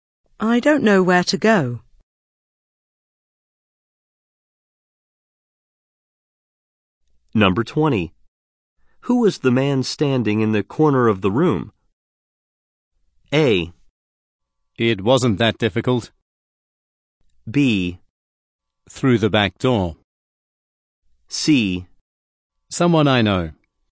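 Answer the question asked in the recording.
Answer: C: Someone I know.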